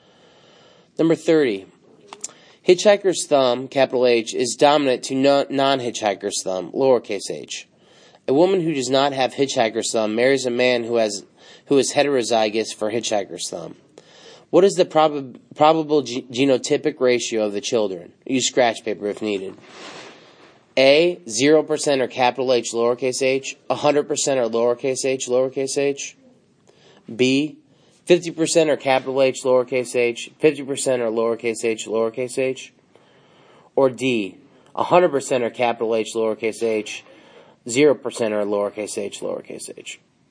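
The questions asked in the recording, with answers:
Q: What is the probable genotypic ratio of the children?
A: B: 50% Hh, 50% hh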